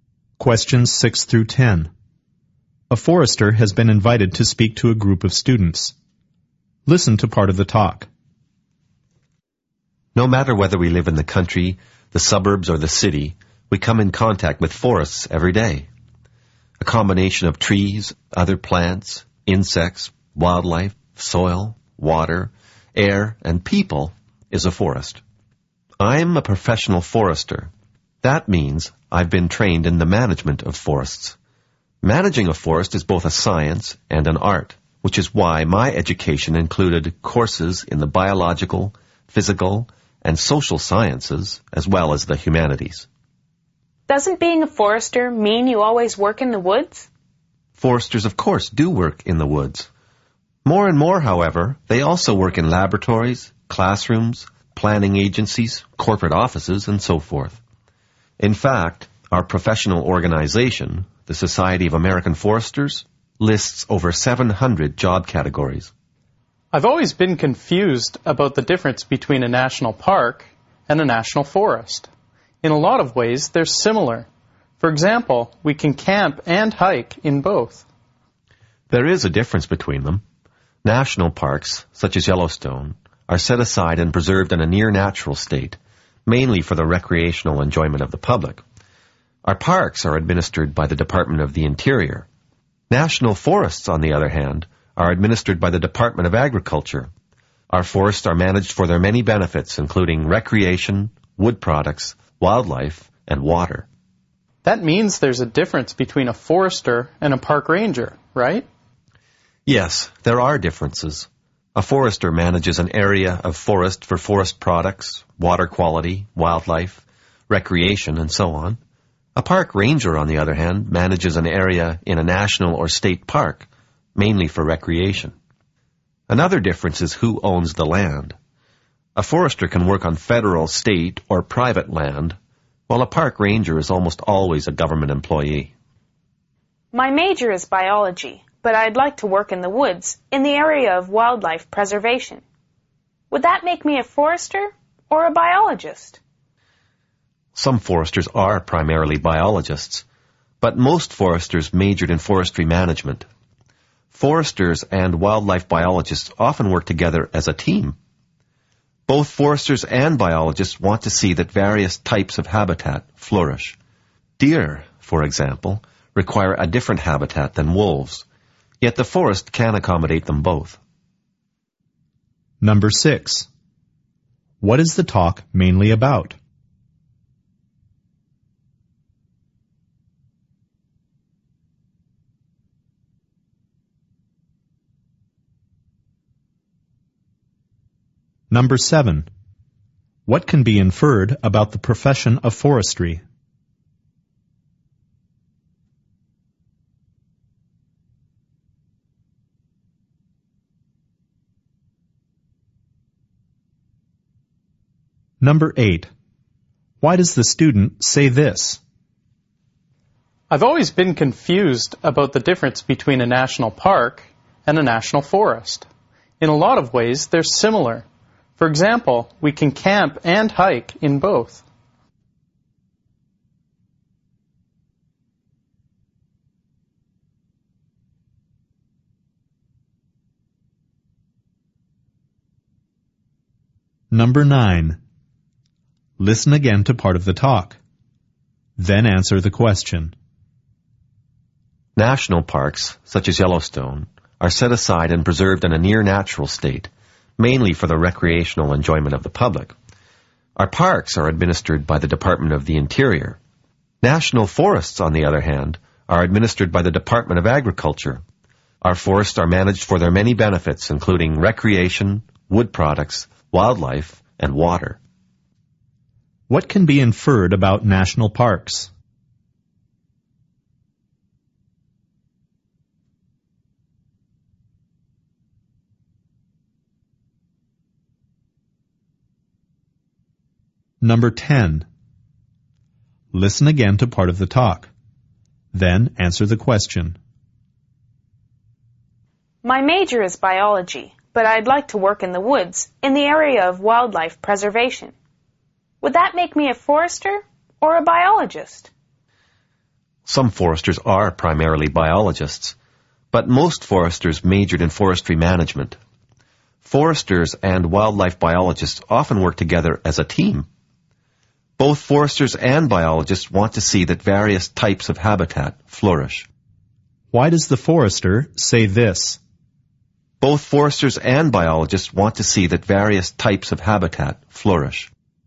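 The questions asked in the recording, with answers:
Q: What is the talk mainly about?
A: The profession of forestry and what foresters do

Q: Why does the student say this?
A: To ask the forester to explain the difference between national parks and national forests

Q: Why does the forester say this?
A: To show that foresters and biologists share goals and work together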